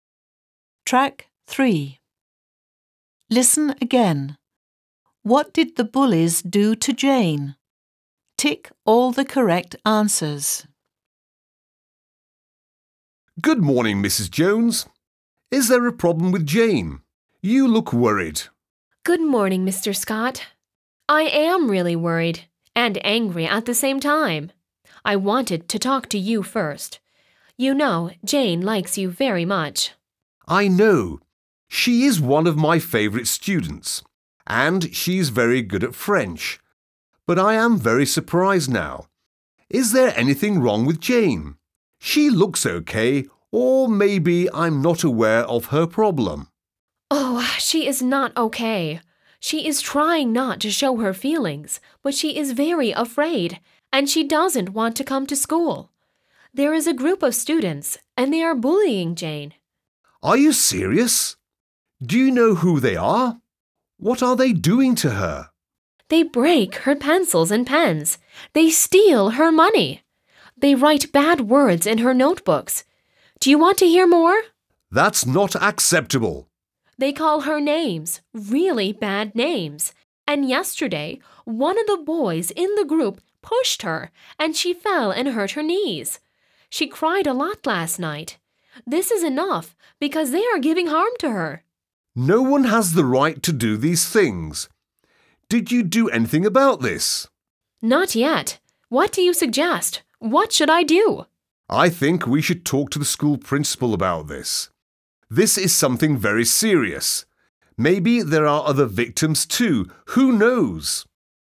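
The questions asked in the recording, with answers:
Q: What did the bullies do to Jane?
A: They broke her pencils and pens, stole her money, wrote bad words in her notebooks, called her names and pushed her so she hurt her knees.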